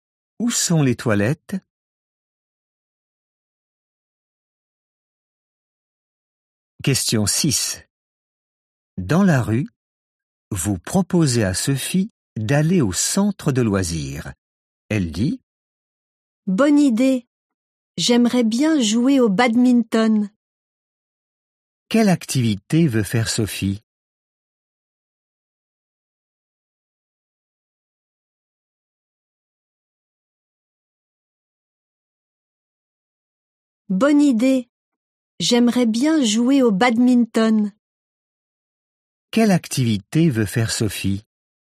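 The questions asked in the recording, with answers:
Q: Quelle activité veut faire Sophie ?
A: Jouer au badminton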